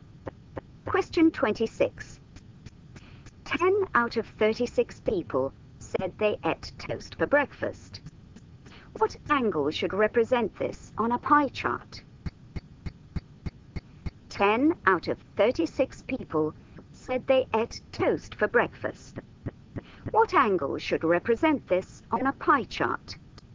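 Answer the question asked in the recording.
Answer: 100 degrees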